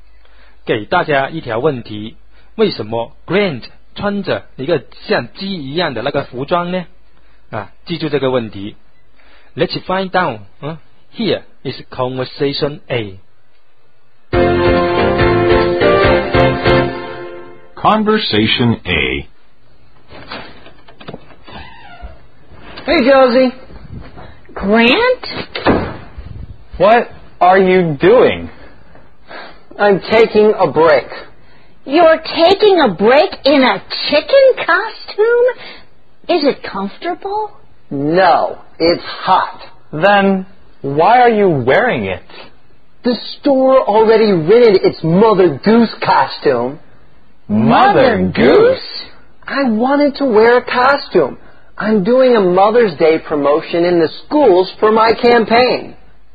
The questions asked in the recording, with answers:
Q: 为什么 Grant 穿着一个像鸡一样的那个服装呢?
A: 哦,原来他穿这个鸡造型的服装是为了在一些校园里面做围绕着母亲节为题的那个宣传活动、推广活动,目的就是为了他的那个选举活动。